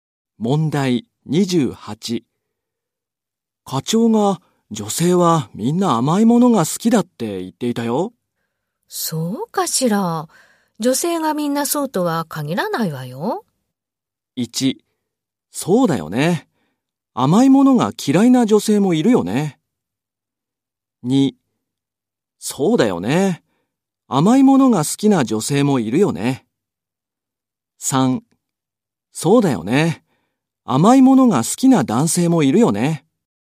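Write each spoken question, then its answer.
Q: 課長が女性はみんな甘いものが好きだって言っていたよ。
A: 2: そうだよね。甘いものが嫌いな女性もいるよね。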